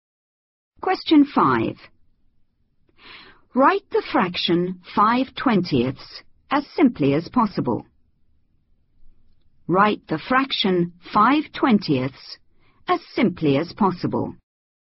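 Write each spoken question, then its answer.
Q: Write the fraction 5/20 as simply as possible.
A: 1/4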